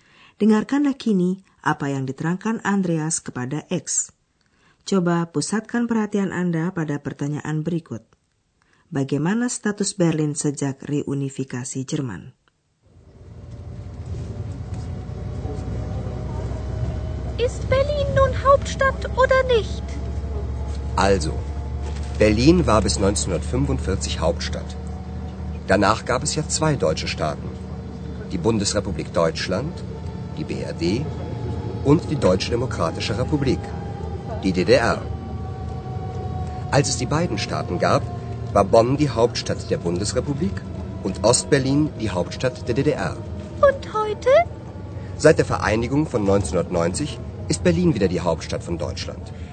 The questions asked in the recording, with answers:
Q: Bagaimana status Berlin sejak reunifikasi Jerman?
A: Sejak kedua negara Jerman bersatu kembali pada tahun 1990, Berlin kembali menjadi ibu kota Jerman.